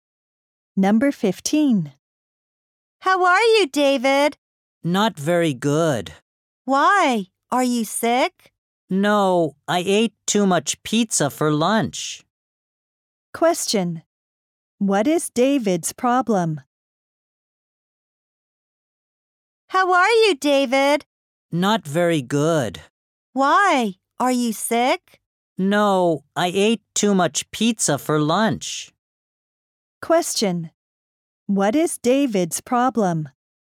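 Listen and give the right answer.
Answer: He ate too much pizza for lunch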